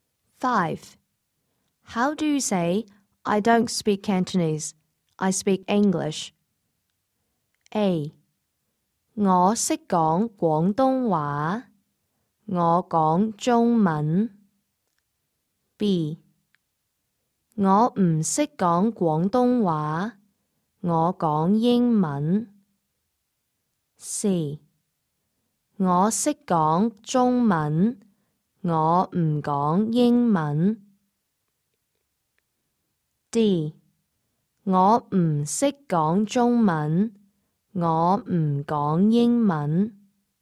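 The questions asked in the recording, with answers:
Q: How do you say, I don't speak Cantonese, I speak English?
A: B: 我不懂广东话,我讲英文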